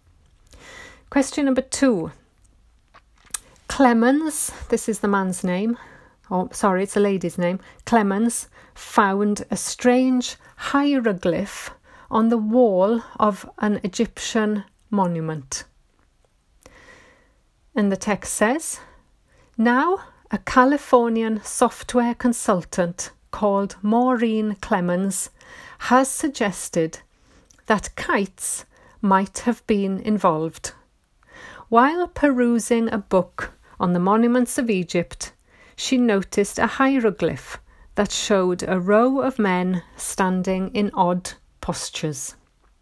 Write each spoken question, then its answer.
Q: Clemens found a strange hieroglyph on the wall of an Egyptian monument.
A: So the answer is false.